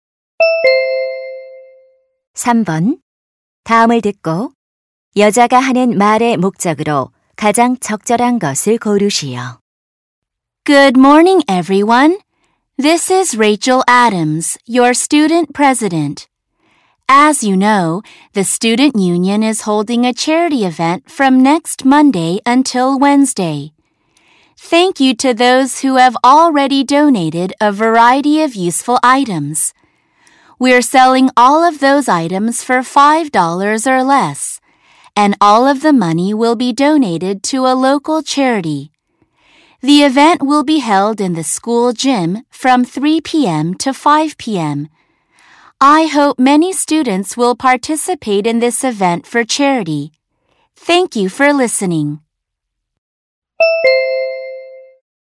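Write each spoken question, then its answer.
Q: 다음을 듣고 여자가 하는 말의 목적으로 가장 적절한 것을 고르시오.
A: 자선 행사 참여를 독려하려고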